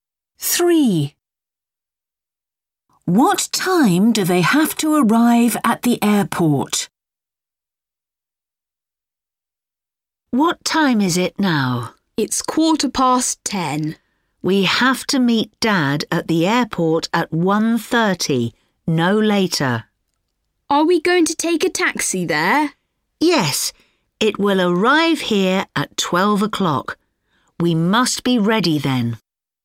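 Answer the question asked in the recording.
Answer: 1:30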